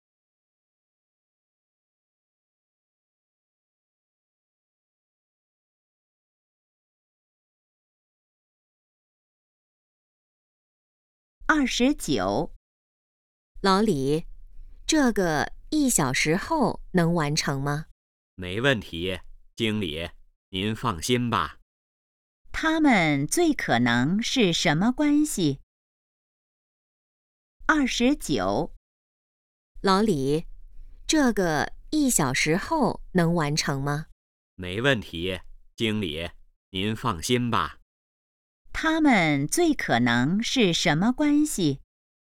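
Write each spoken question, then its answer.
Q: 他们最可能是什么关系?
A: 同事(经理和职员)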